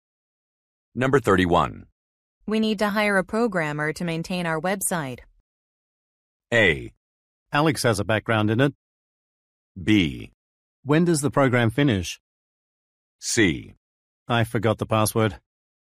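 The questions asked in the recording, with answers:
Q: We need to hire a programmer to maintain our website.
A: A: Alex has a background in it.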